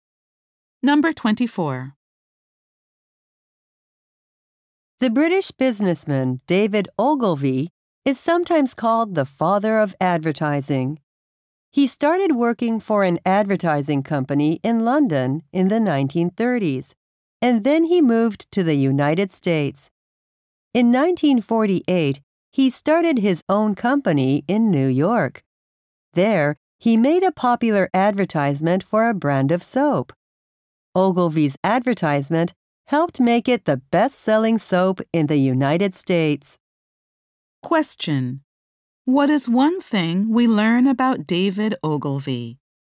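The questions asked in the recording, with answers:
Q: What is one thing we learn about David Ogilvy?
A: He made a popular soap advertisement.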